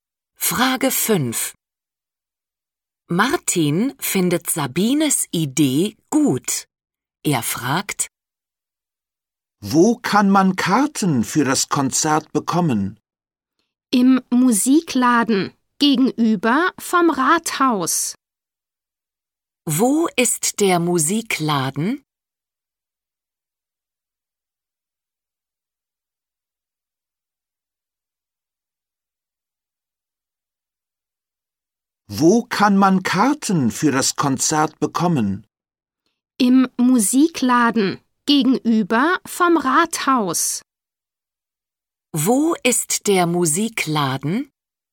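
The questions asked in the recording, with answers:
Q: Wo ist der Musikladen?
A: gegenüber vom Rathaus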